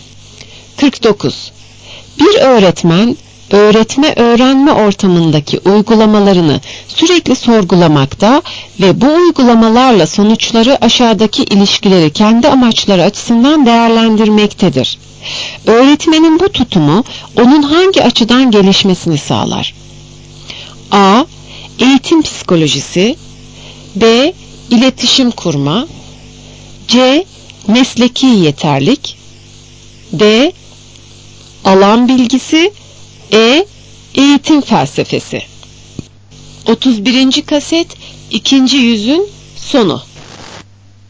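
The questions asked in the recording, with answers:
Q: Öğretmenin bu tutumu onun hangi açıdan gelişmesini sağlar?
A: C: Mesleki yeterlik.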